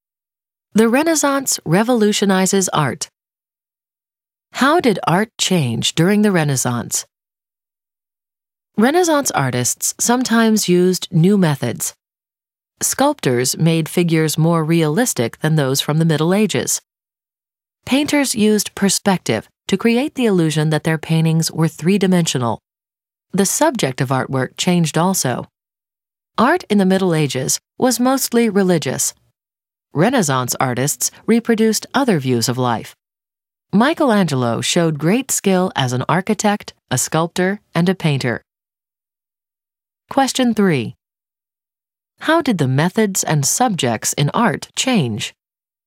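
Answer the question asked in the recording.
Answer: Art became more realistic and used perspective; subjects went beyond religion to other views of life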